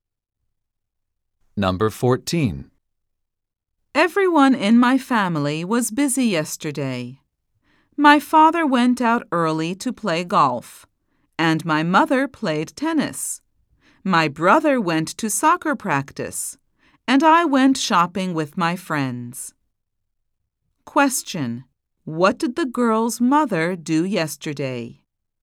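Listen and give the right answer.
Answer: She played tennis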